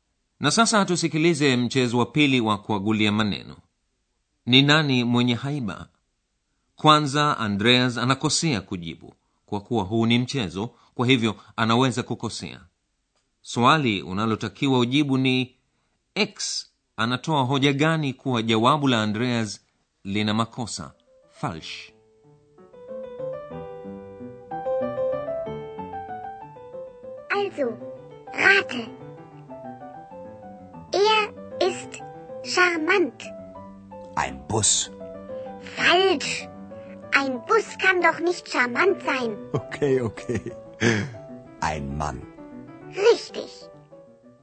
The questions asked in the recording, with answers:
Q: swali unalotakiwa ujibu ni x anatoa hoja gani kuwa jawabu la andreas lina makosa falsh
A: x anayetoa hoja ile aliyokuwa akiitazamia andreas basi haliwezi kuwa na haiba